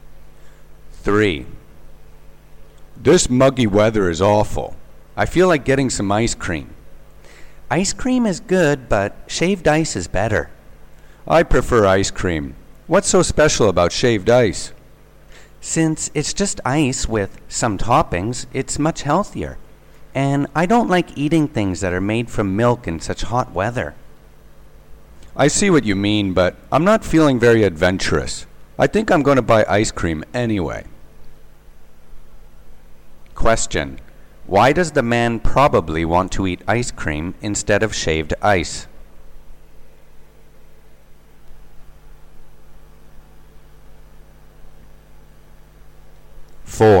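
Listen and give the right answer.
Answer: He's not feeling adventurous and prefers ice cream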